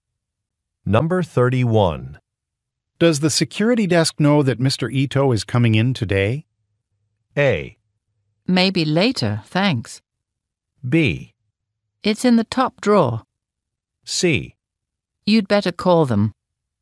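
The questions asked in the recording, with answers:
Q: Does the security desk know that Mr. Ito is coming in today?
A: C: You'd better call them.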